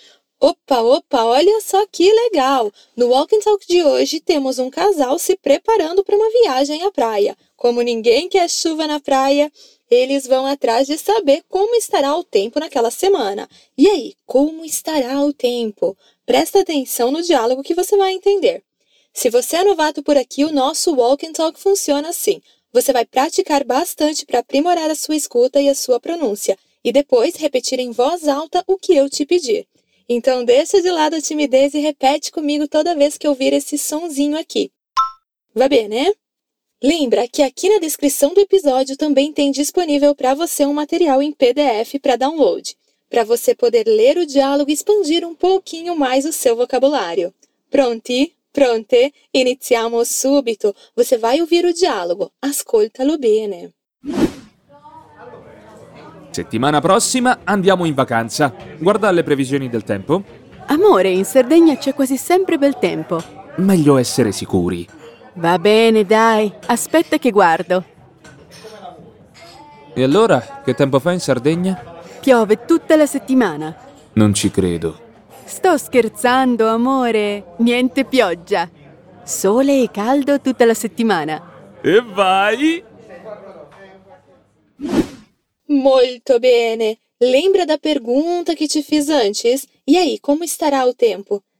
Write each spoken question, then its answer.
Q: E aí, como estará o tempo?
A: Nada de chuva, sol e calor a semana inteira.